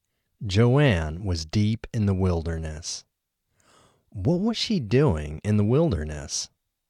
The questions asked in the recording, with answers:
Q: What was she doing in the wilderness?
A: She was hunting wild mushrooms in the wilderness.